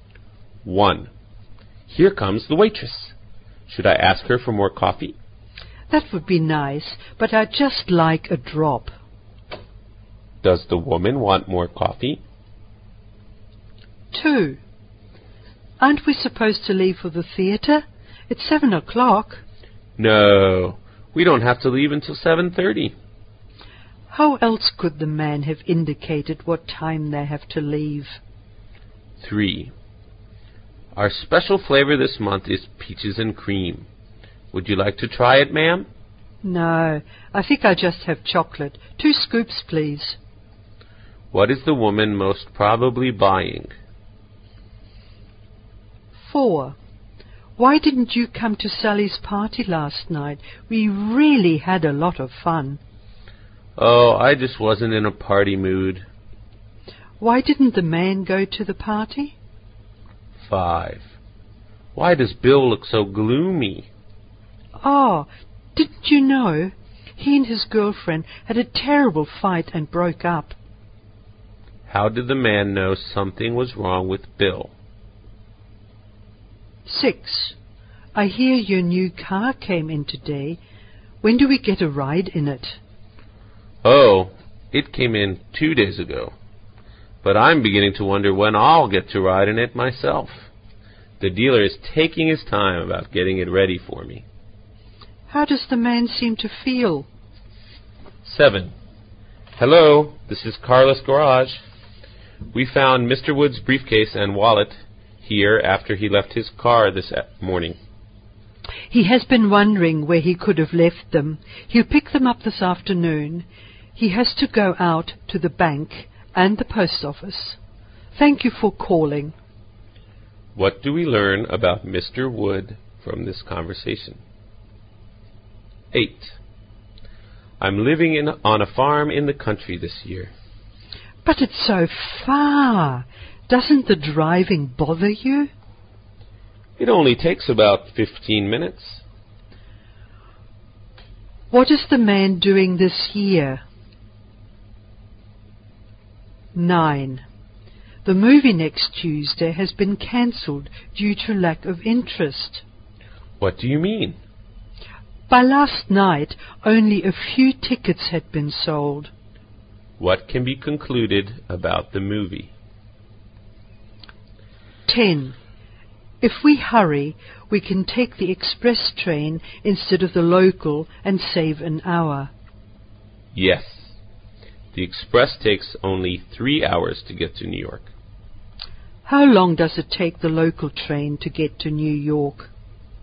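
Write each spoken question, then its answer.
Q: Does the woman want more coffee?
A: Yes, but just a little

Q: How else could the man have indicated what time they have to leave?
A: At half past seven

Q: What is the woman most probably buying?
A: Chocolate ice cream

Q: Why didn't the man go to the party?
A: He wasn't in a party mood

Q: What is the man doing this year?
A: Living on a farm in the country

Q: What can be concluded about the movie?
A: Few people were interested, so it was cancelled

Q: How long does it take the local train to get to New York?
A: Four hours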